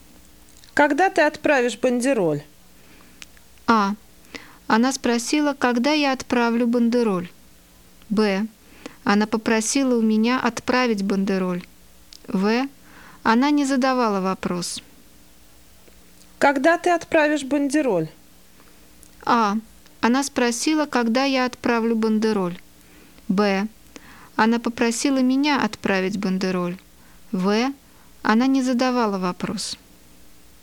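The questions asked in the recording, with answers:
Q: Когда ты отправишь бандероль?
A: А: Она спросила, когда я отправлю бандероль.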